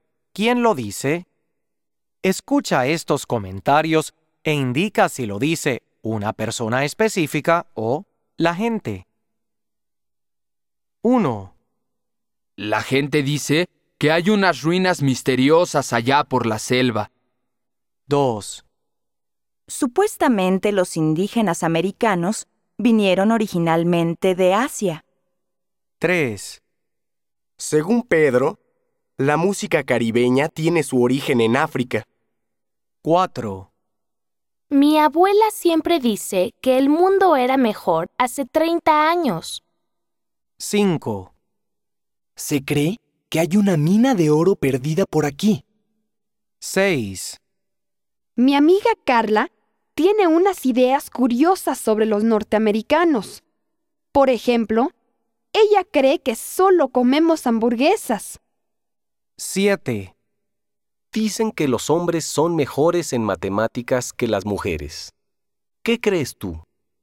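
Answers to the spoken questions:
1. la gente
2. la gente
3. una persona específica
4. una persona específica
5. la gente
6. una persona específica
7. la gente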